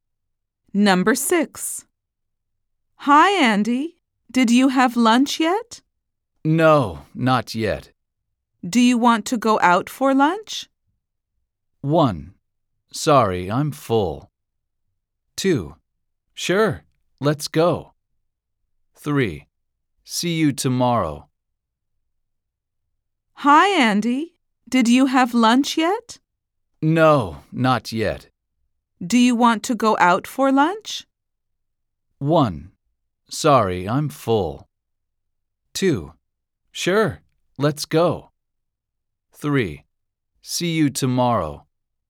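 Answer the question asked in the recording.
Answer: 2: Sure, let's go.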